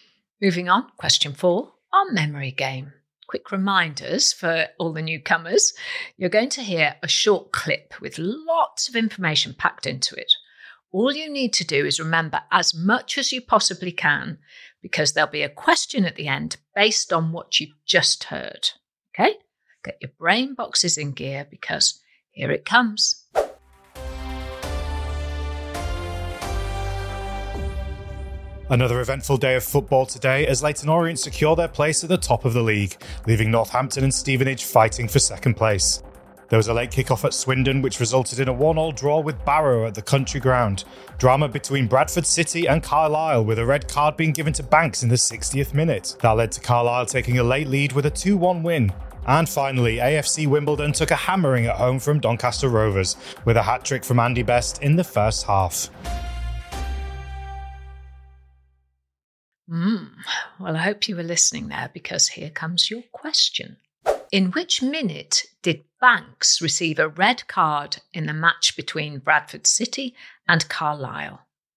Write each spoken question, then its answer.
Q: In which minute did Banks receive a red card in the match between Bradford City and Carlisle?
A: And the answer I wanted was the 60th minute.